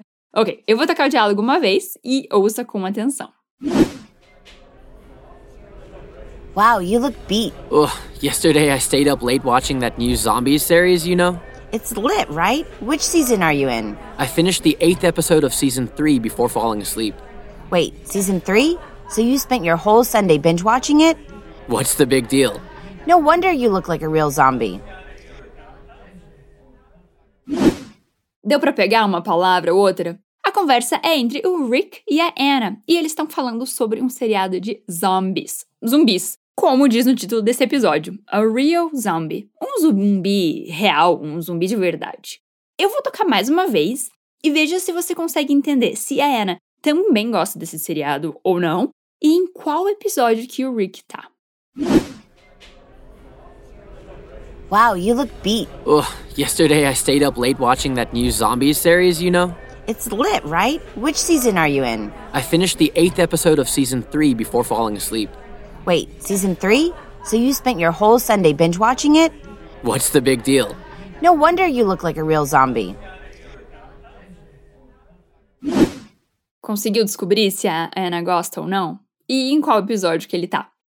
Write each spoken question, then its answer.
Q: Conseguiu descobrir se a Anna gosta ou não?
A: Então, isso significa que a Anna curte muito essa série também, né?

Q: E em qual episódio que ele tá?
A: The eighth episode, o oitavo episódio.